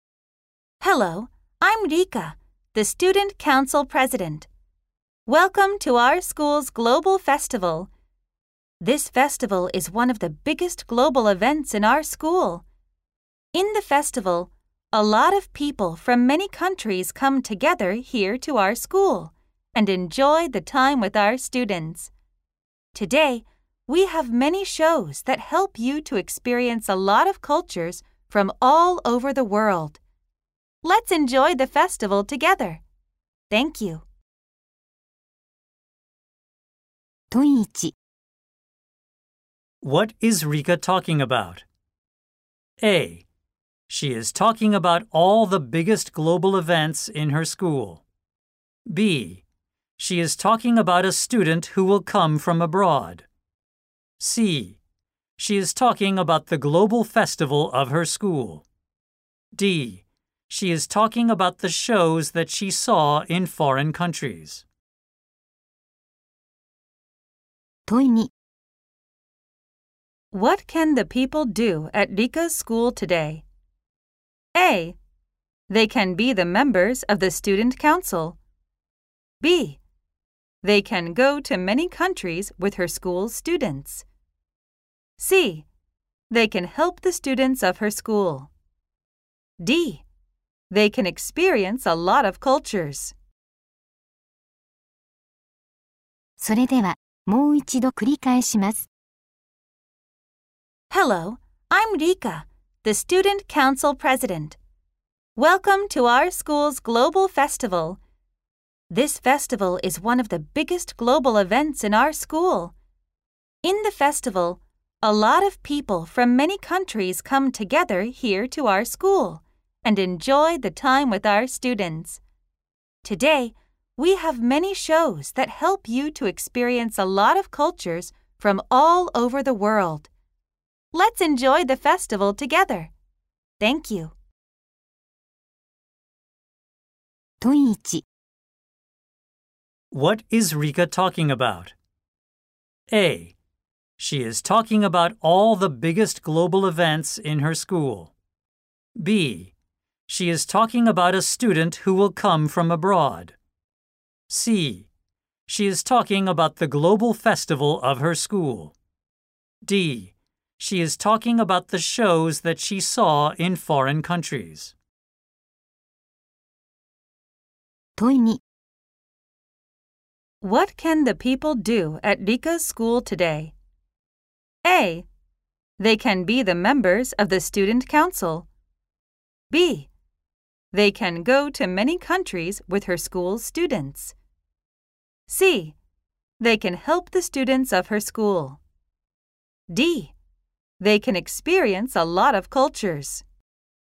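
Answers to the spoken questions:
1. C: She is talking about the global festival of her school.
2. D: They can experience a lot of cultures.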